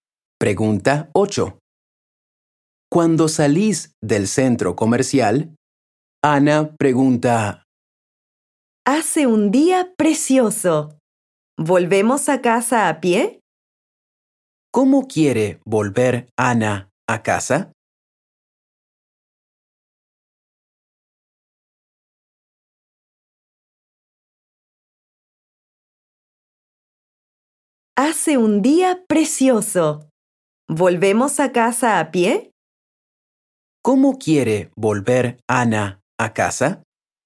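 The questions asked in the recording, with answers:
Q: ¿Cómo quiere volver Ana a casa?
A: A pie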